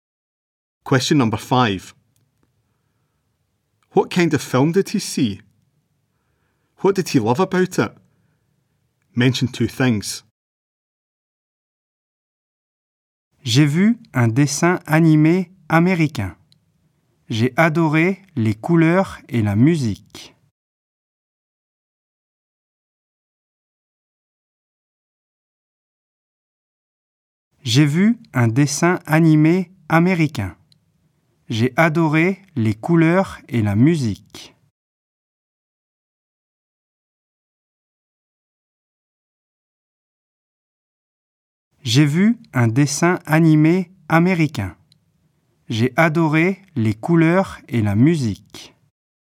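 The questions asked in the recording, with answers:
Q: What kind of film did he see?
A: An American cartoon

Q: What did he love about it?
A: The colours and the music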